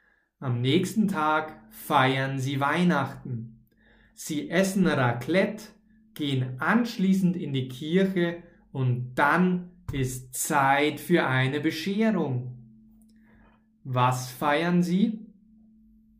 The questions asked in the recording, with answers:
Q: Was feiern sie?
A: Weihnachten. Sie feiern Weihnachten.